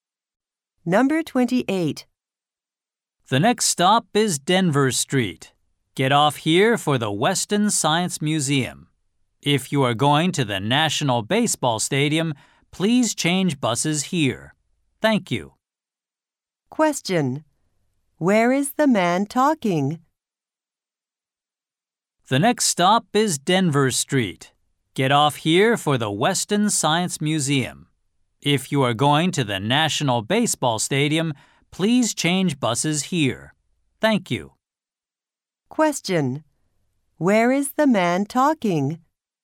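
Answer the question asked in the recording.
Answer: On a bus.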